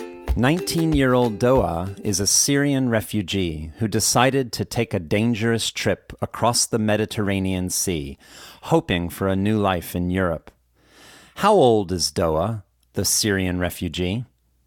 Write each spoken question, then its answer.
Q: How old is Doa, the Syrian refugee?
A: Doa is a 19-year-old Syrian refugee.